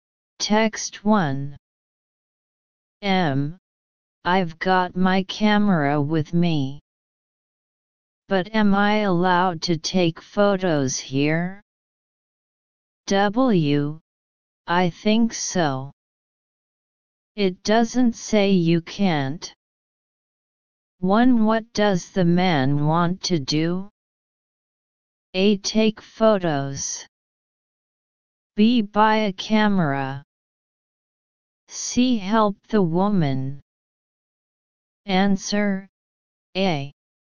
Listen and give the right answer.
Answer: Answer A.